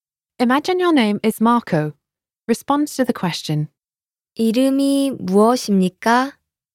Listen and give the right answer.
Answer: 제 이름은 마르코입니다.